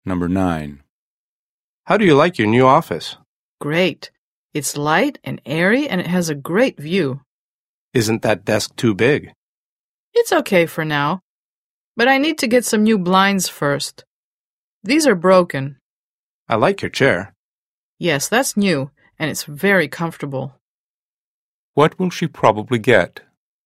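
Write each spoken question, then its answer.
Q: What will she probably get?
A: new blinds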